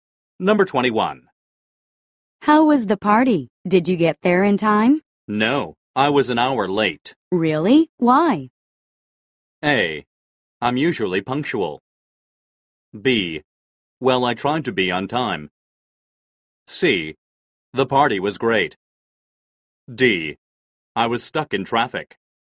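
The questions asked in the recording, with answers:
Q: Really? Why?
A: D: I was stuck in traffic.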